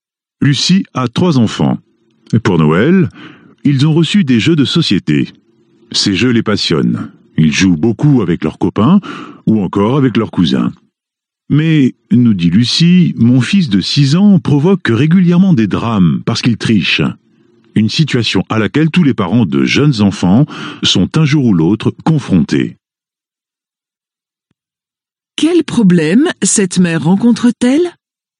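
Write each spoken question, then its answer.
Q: Quel problème cette mère rencontre-t-elle ?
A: Son fils de 6 ans triche aux jeux de société, ce qui provoque des drames.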